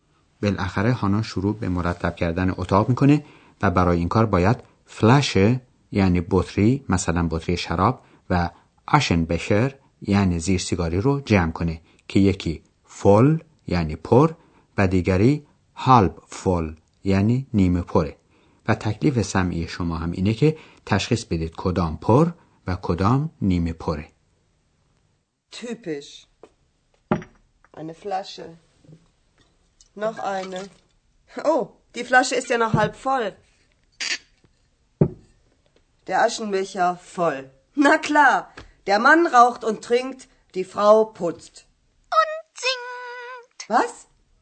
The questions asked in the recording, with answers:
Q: تکلیف سمعی شما هم اینه که تشخیص بدید کدام پر و کدام نیمه پره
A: زیر سیگاری پر و بطری شراب نیمه پر بود.